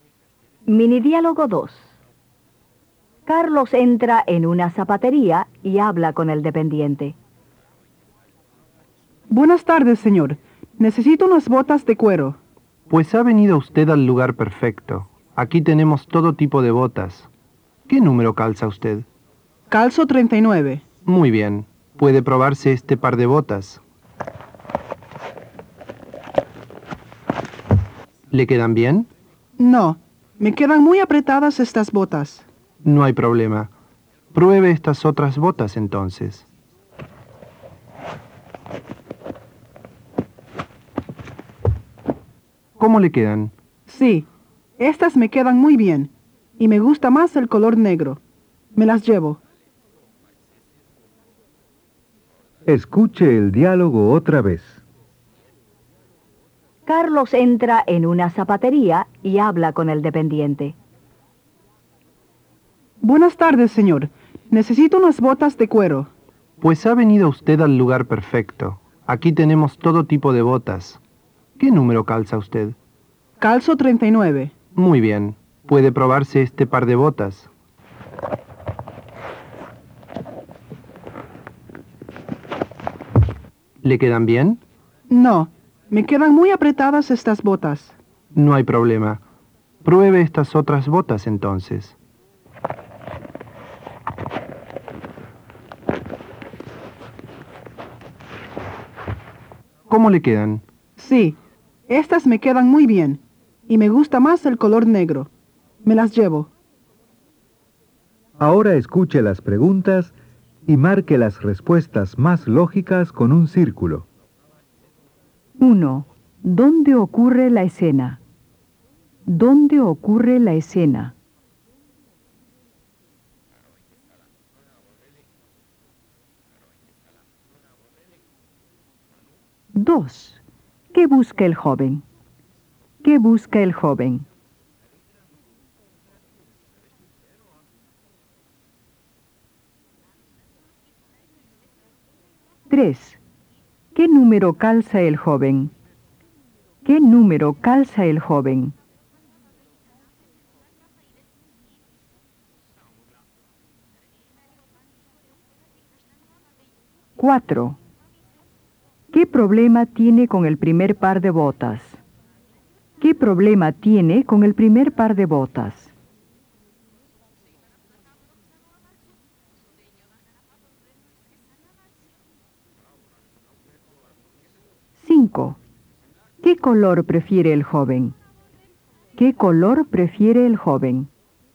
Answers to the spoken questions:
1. B. En la zapatería.
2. C. Unas botas de cuero.
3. B. Calza 39.
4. A. Le quedan apretados.
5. C. El negro.